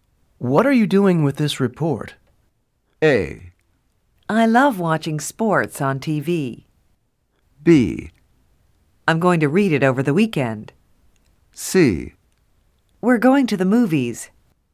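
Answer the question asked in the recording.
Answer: B: I'm going to read it over the weekend.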